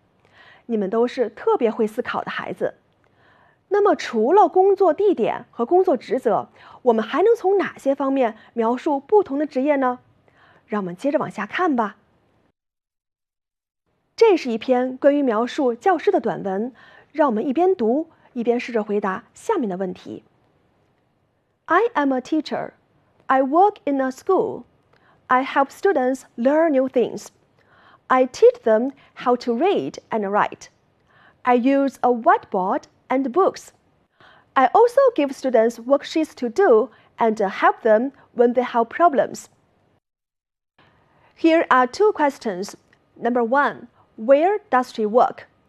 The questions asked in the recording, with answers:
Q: where does she work?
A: She works in a school.